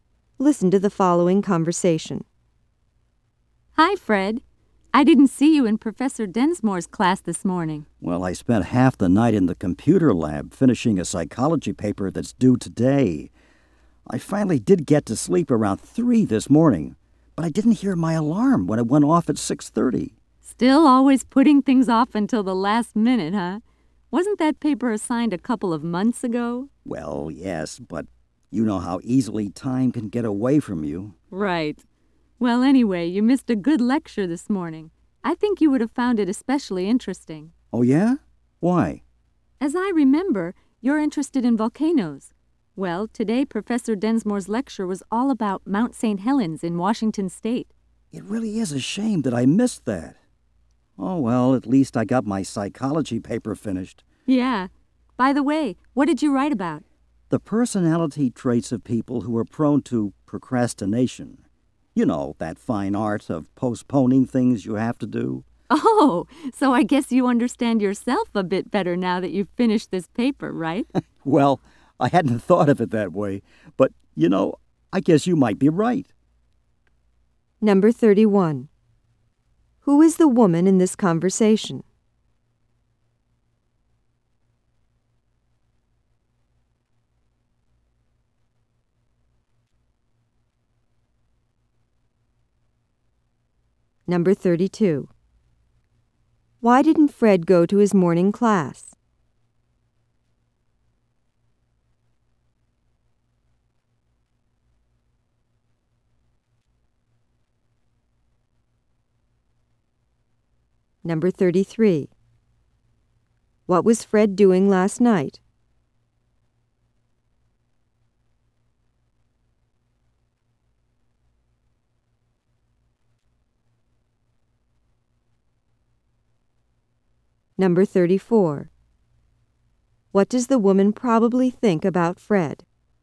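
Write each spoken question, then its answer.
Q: Why didn't Fred go to his morning class?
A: He overslept; he didn't hear his alarm after staying up late

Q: What was Fred doing last night?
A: Finishing a psychology paper in the computer lab

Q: What does the woman probably think about Fred?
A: He is a procrastinator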